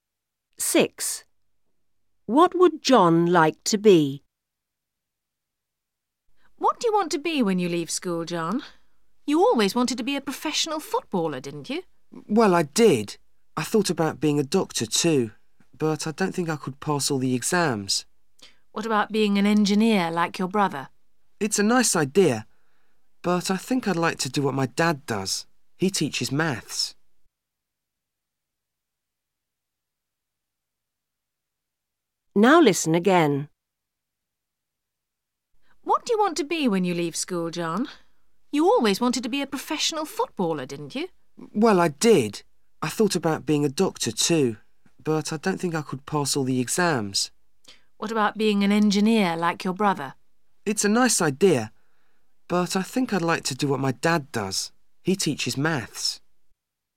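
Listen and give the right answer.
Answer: A maths teacher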